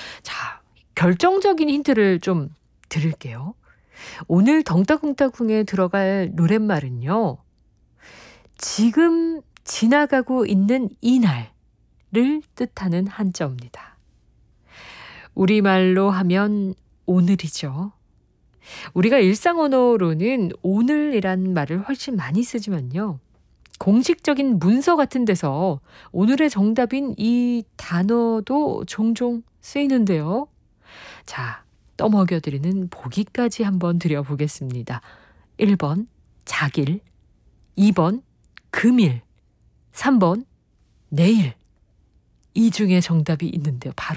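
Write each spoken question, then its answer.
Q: 1번, 작일. 2번, 금일, 3번, 내일.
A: 2번: 금일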